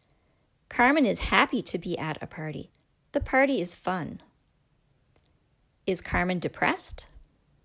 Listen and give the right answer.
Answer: No, Carmen is happy.